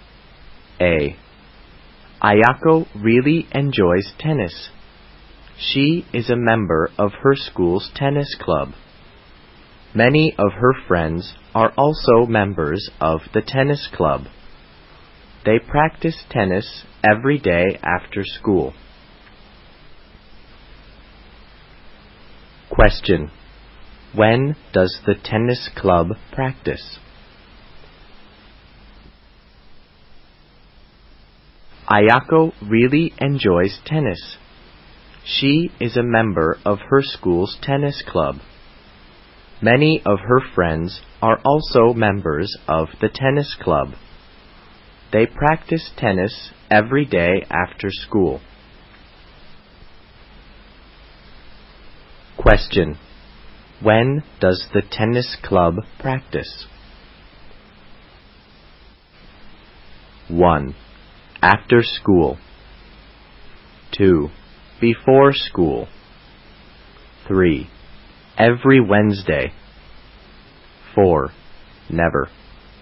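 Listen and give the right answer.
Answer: 1: After school.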